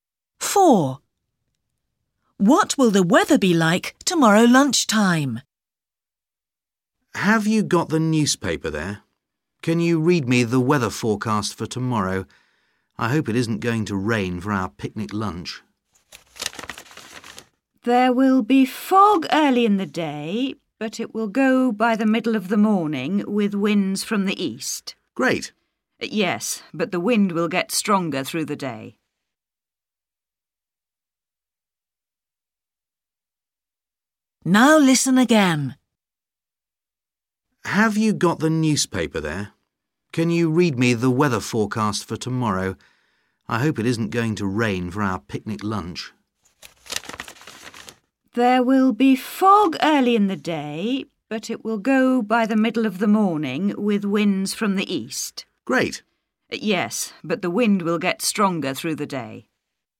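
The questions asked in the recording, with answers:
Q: What will the weather be like tomorrow lunchtime?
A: windy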